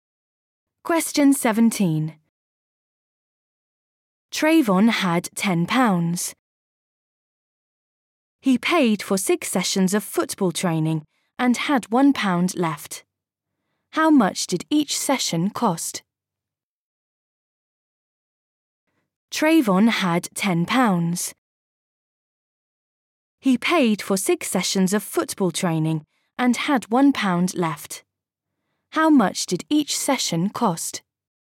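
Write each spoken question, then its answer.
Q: How much did each session cost?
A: £1.50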